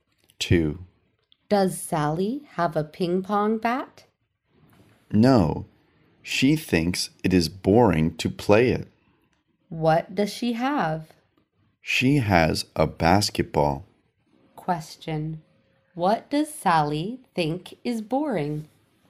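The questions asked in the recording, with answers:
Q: What does Sally think is boring?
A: Playing ping pong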